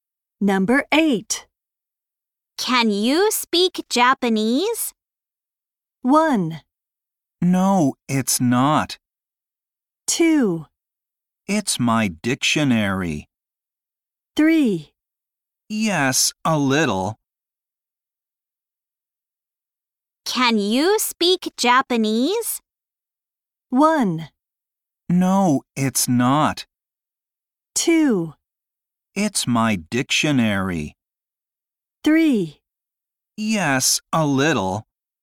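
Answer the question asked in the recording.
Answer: 3: Yes, a little.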